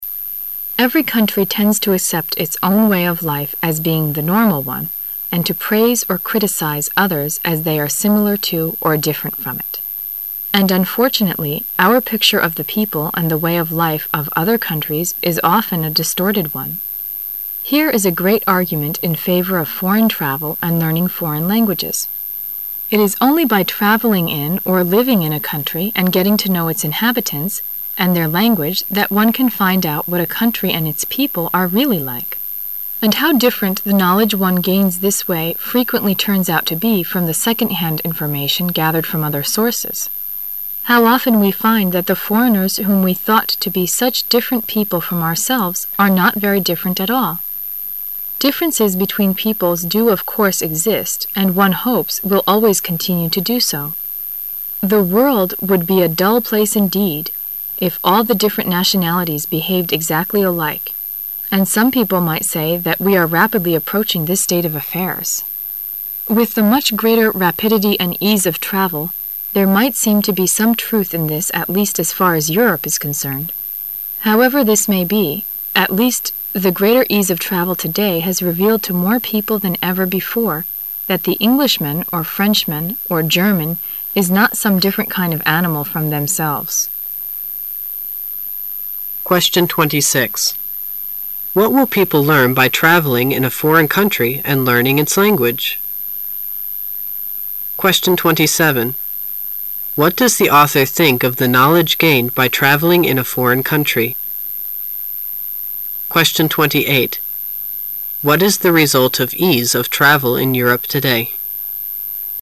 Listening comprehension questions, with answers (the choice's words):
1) What does the author think of the knowledge gained by traveling in a foreign country?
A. It is from second-hand information.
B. It is from the arguments about the country.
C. It is different from what one had before the travel.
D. It is gathered from other sources than from its inhabitants.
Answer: It is different from what one had before the travel.

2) What is the result of ease of travel in Europe today?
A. Differences between people will gradually disappear.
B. Differences between people will not exist as one hopes.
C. Differences between people will always continue to exist and the world will be a dull place.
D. Differences between people do exist even though different nationalities behave exactly alike.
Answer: Differences between people will gradually disappear.

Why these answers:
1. 细节题。题干问通过traveling in a foreign country 和 learning its language,人们会发现什么。回忆听力原文中相关细节:It is only by traveling in,...that one can find out what a

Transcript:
[解析] 26-28 Every country tends to accept its Own way of life as being the normal one and to praise or criticize others as they are similar to or different from it. And unfortunately, our picture of the people and the way of life of other countries is often a distorted one. Here is a great argument in favor of foreign travel and learning foreign languages. It is only by traveling in, or living in a country and getting to know its inhabitants and their language that one can find out what a country and its people are really like. And how different the knowledge one gains this way frequently' turns out to be from the second-hand information gathered from other sources! How often we find that' the foreigners whom we thought to be such different people from ourselves are not very different at all! Differences between peoples do of course exist and, one hopes, will always continue to do so. The world would be a dull place indeed ff all the different nationalities behaved exactly alike, and some people might say that we are rapidly approaching this state of affairs. With the much greater rapidity and ease of travel, there might seem to be some truth in this at least as far as Europe is concerned. However this may be, at least the greater case of travel today has revealed to more people than ever before that the Englishman or Frenchman or German is not some different kind of animal from themselves. What will people learn by traveling in a foreign country and learning its language?